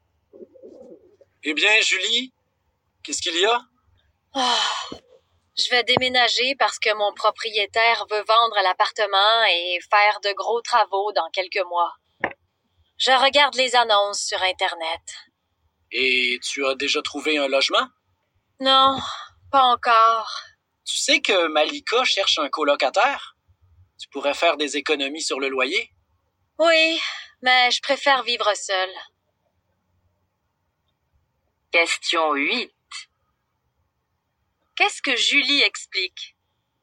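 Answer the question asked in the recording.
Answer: Elle doit déménager car son propriétaire veut vendre l'appartement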